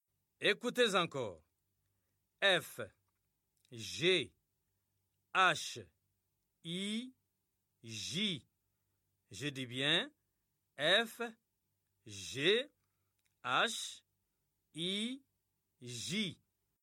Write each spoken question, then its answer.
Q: F, G, H, I, J. Je dis bien F, G, H, I, J.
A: J'espère que les élèves ont écrit K.